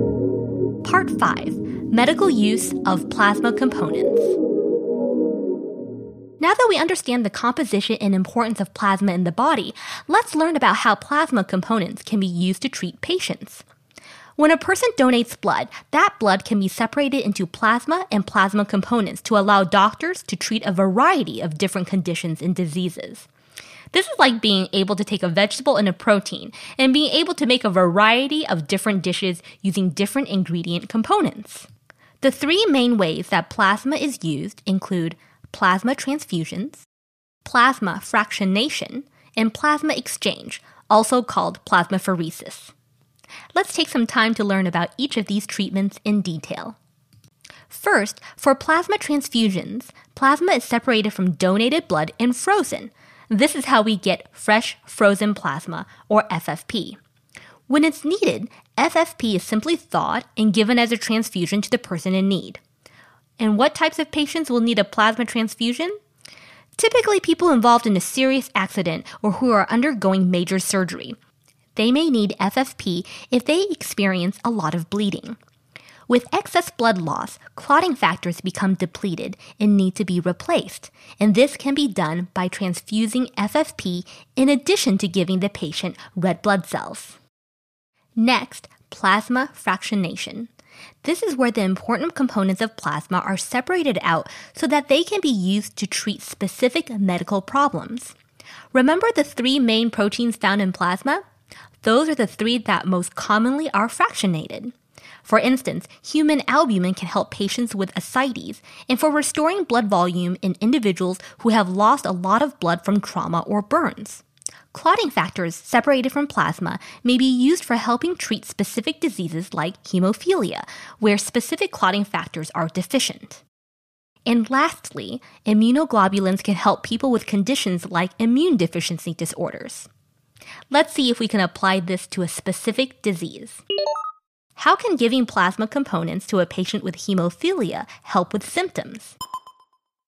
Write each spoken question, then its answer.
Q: How can giving plasma components to a patient with hemophilia help with symptoms?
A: By providing clotting factors that are deficient in hemophilia.